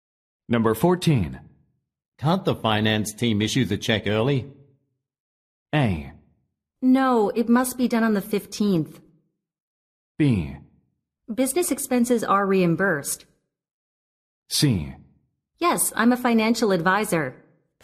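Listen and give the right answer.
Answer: A: No, it must be done on the 15th.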